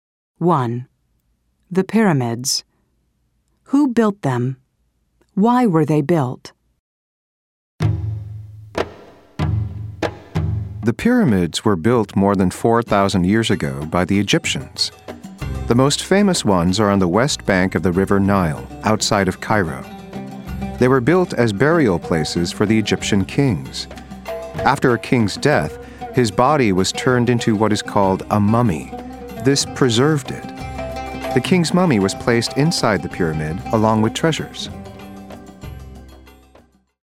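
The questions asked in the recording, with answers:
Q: Who built them?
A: The Egyptians

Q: Why were they built?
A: As burial places for the Egyptian kings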